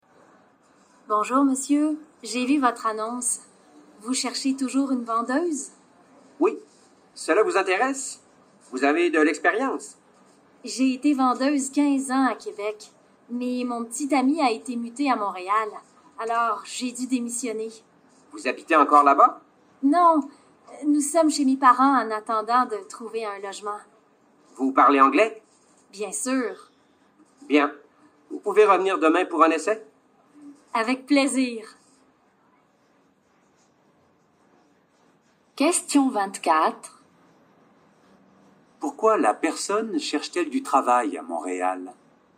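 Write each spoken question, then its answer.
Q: Pourquoi la personne cherche-t-elle du travail à Montréal?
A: Parce que son petit ami a été muté à Montréal.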